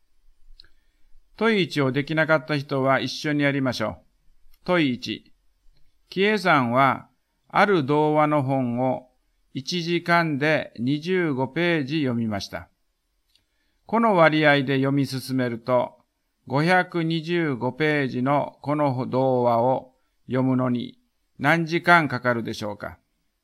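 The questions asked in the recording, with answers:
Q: この割合で読み進めると、525ページのこの童話を読むのに何時間かかるでしょうか。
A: 21時間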